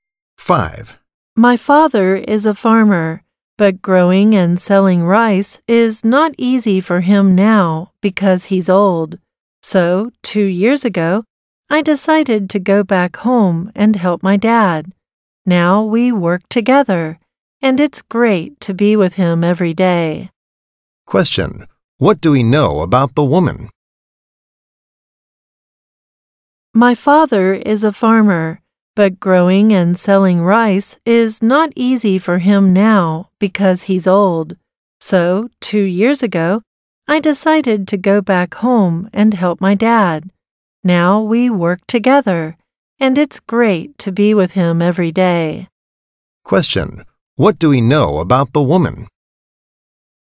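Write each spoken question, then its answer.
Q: What do we know about the woman?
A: She went home to help her father grow and sell rice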